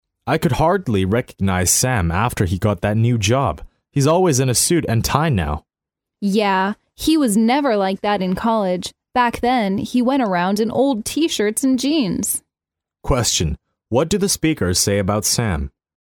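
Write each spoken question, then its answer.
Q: what do the speakers say about Sam?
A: He now dresses very formally, unlike in college.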